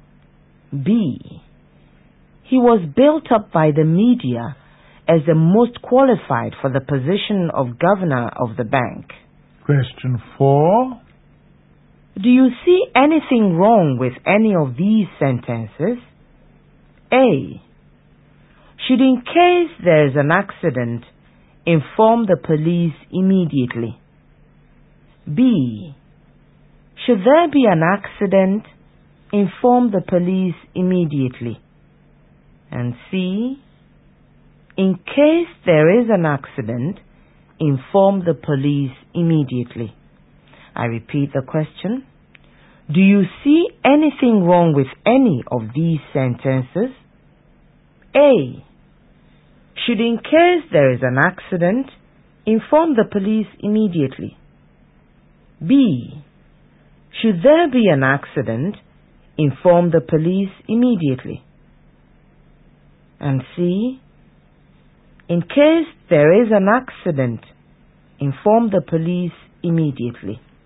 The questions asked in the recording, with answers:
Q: Do you see anything wrong with any of these sentences?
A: The sentence is wrong.